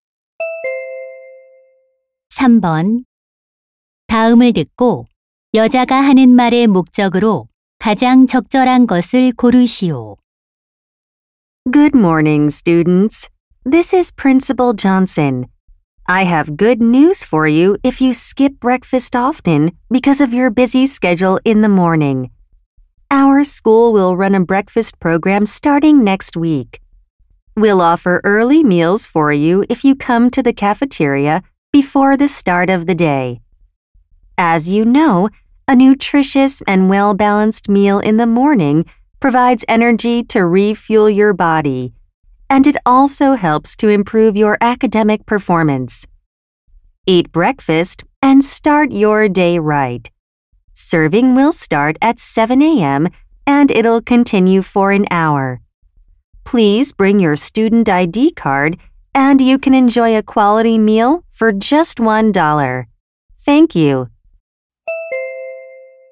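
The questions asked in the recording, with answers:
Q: 다음을 듣고 여자가 하는 말의 목적으로 가장 적절한 것을 고르시오.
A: 학교 아침 식사 프로그램 시행을 알리려고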